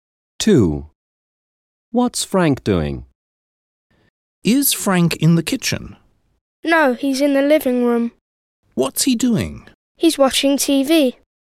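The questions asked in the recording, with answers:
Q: What's Frank doing?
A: watching TV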